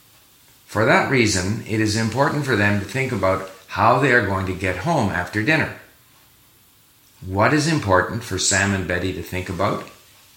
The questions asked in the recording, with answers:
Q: What is important for Sam and Betty to think about?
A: It's important for them to think about how they are going to get home after dinner.